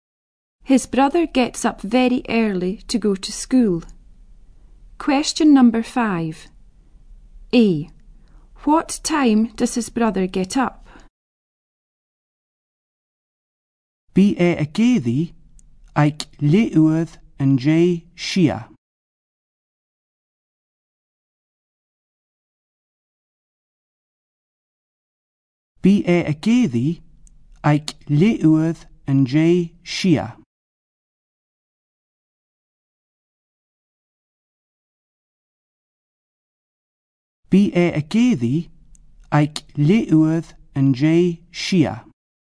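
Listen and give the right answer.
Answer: Half past six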